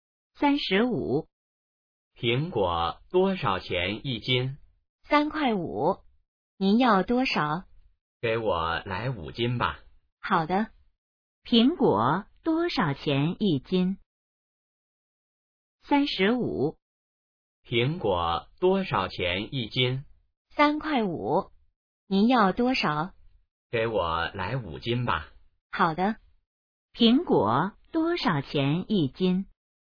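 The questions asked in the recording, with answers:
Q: 苹果多少钱一斤?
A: 3.5元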